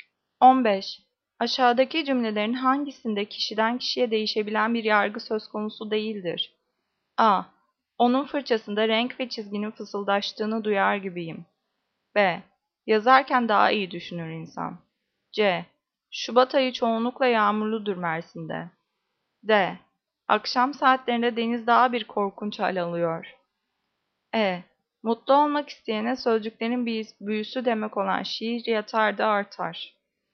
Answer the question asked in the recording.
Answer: Cevap C. Şubat ayı çoğunlukla yağmurludur Mersin'de.